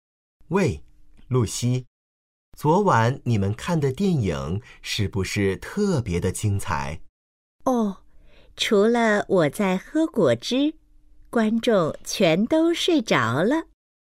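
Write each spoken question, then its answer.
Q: 女的是什么意思?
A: 电影很无聊,不精彩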